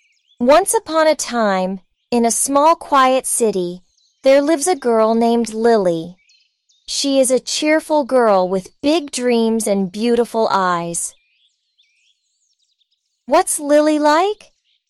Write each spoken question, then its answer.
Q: What's Lily like?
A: She's a cheerful girl with beautiful eyes.